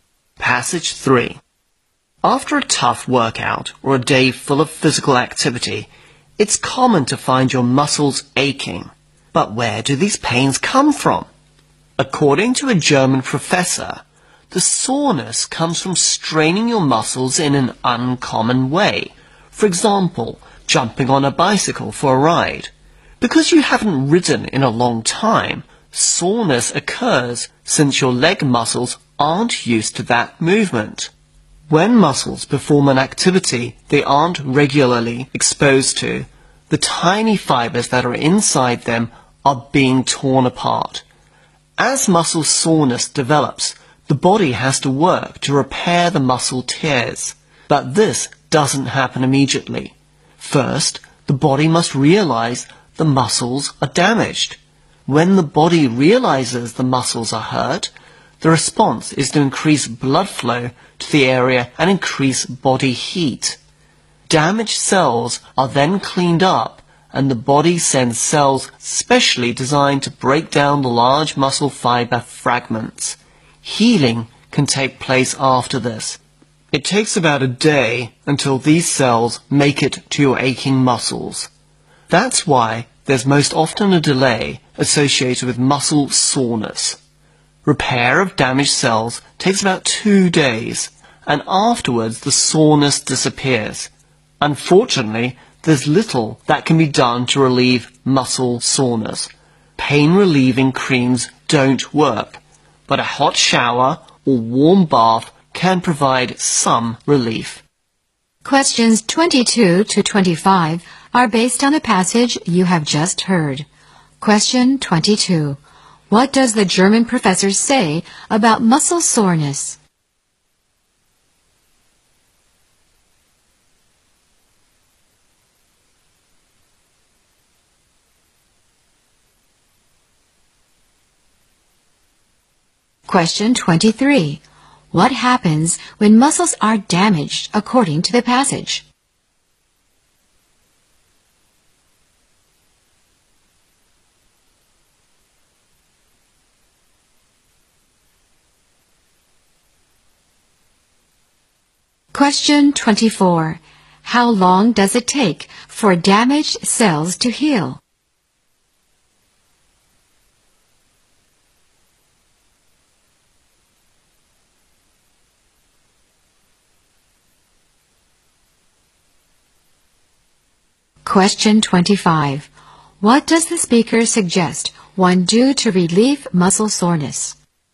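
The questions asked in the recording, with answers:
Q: What does the German professor say about muscle soreness?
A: It comes from straining muscles in an uncommon way

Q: What happens when muscles are damaged according to the passage?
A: Blood flow to the area and body heat increase

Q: How long does it take for damaged cells to heal?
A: About 2 days

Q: What does the speaker suggest one do to relieve muscle soreness?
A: Take a hot shower or warm bath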